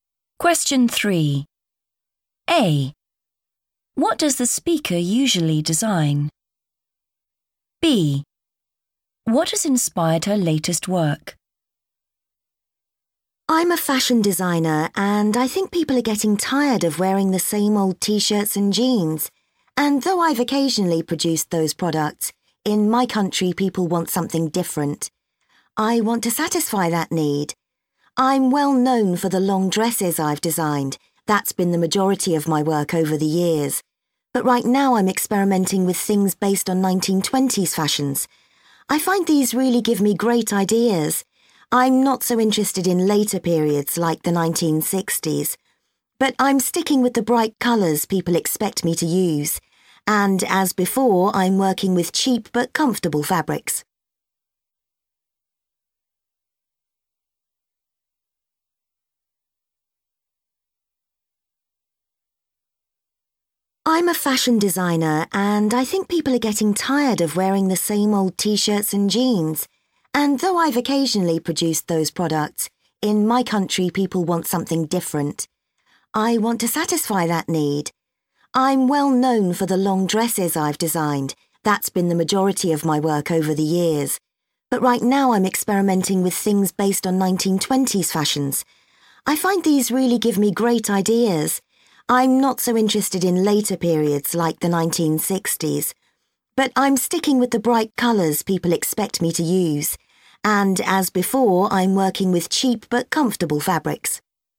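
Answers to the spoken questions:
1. long dresses
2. 1920s fashions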